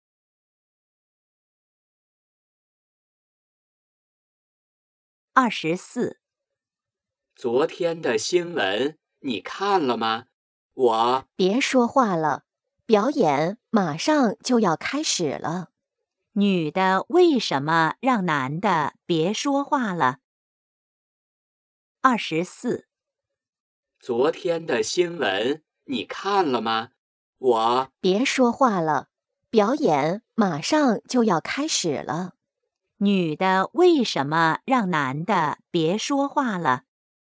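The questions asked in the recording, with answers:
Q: 女的为什么让男的别说话了?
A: 表演马上就要开始了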